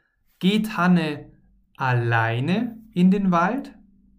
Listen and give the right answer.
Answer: Nein, sie geht nicht alleine in den Wald, sondern mit Teresa.